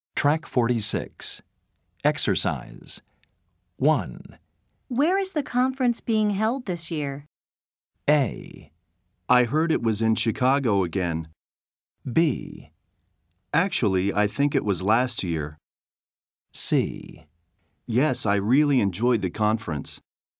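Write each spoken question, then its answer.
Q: Where is the conference being held this year?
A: A: I heard it was in Chicago again.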